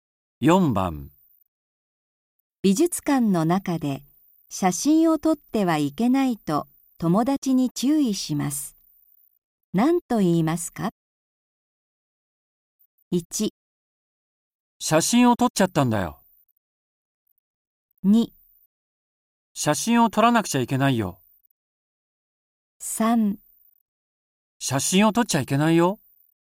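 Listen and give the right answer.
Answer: 3: 写真を撮っちゃいけないよ。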